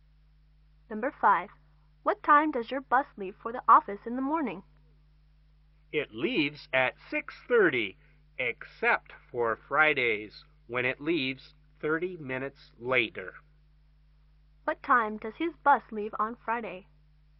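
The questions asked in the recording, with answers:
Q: What time does his bus leave on Friday?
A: 7:00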